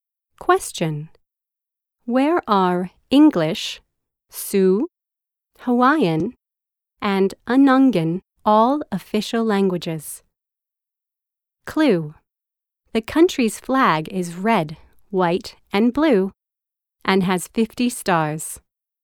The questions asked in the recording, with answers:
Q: Where are English, Sioux, Hawaiian and Anangan all official languages?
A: The United States.